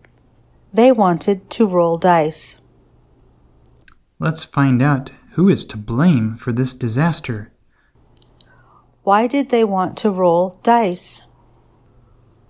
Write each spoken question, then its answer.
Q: Why did they want to roll dice?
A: They wanted to find out who was to blame for this disaster.